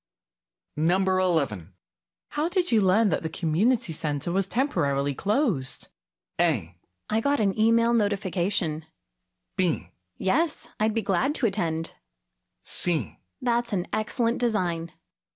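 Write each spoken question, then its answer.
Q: How did you learn that the community center was temporarily closed?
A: A: I got an email notification.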